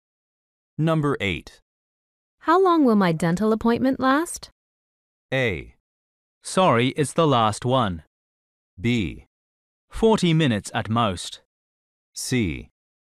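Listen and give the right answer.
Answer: B: 40 minutes at most.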